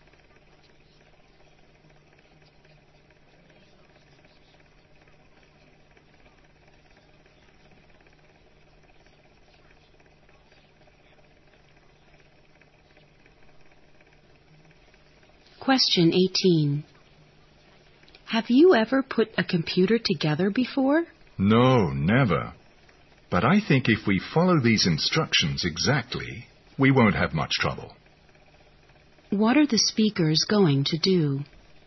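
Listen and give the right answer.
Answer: Put a computer together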